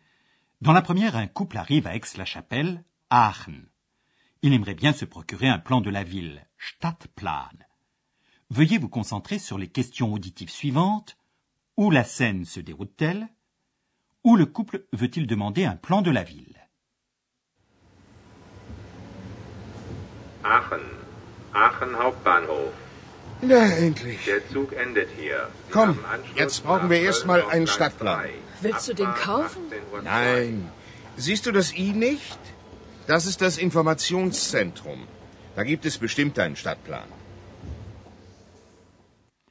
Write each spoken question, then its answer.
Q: Où la scène se déroule-t-elle?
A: la scène se déroule dans la gare centrale d'Aix-la-Chapelle.

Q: Où le couple veut-il demander un plan de la ville?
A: il y a un centre d'information servant de syndicat d'initiative où l'on peut obtenir un mini-plan de la ville.